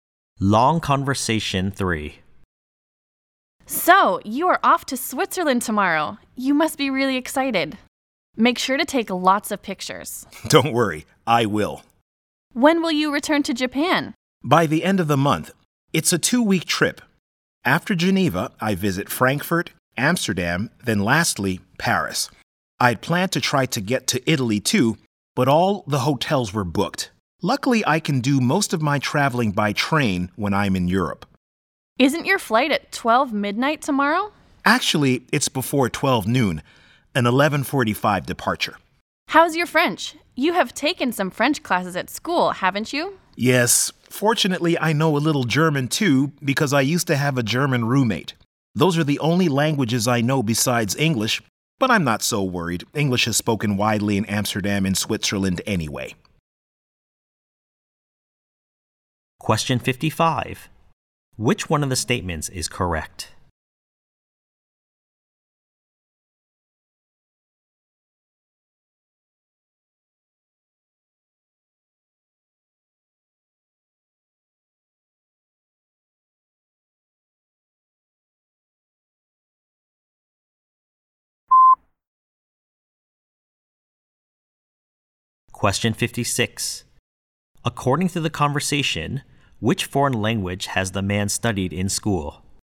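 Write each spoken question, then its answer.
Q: According to the conversation, which foreign language has the man studied in school?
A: French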